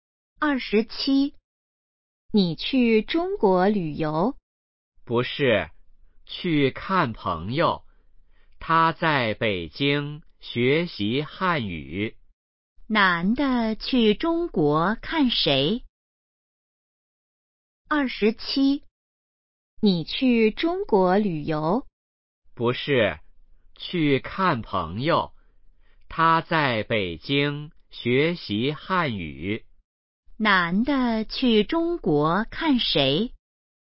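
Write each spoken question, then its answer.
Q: 男的去中国看谁?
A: 朋友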